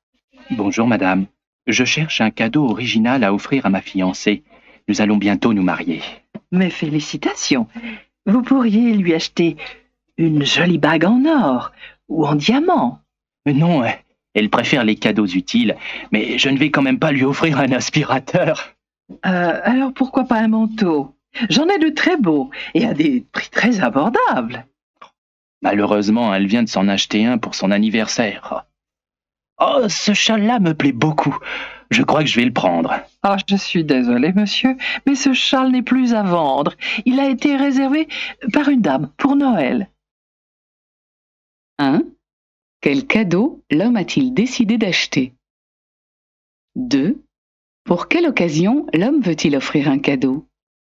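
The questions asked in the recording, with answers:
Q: Quel cadeau l'homme a-t-il décidé d'acheter?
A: Un châle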